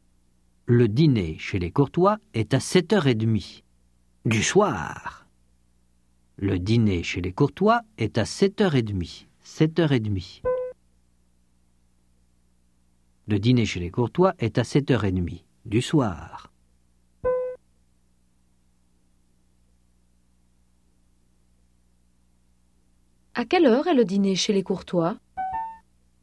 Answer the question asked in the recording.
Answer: À 7h30 du soir.